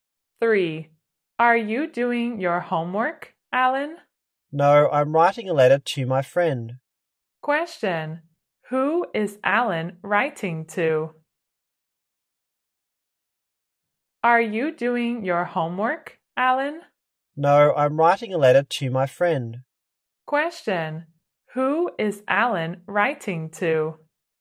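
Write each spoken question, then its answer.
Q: Who is Alan writing to?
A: His friend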